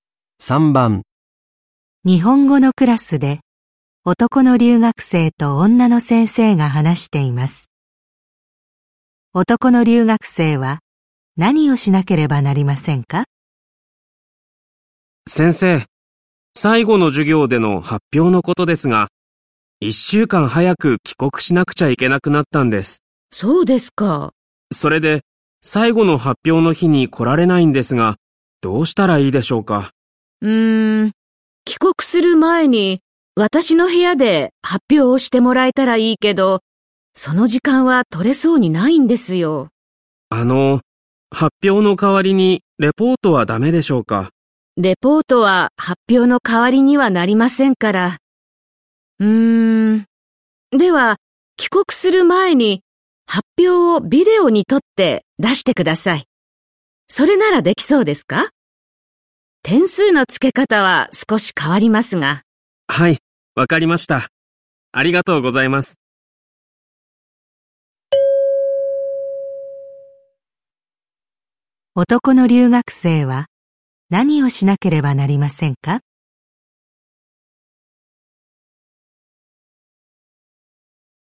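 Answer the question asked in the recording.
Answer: 帰国する前に発表をビデオに撮って出す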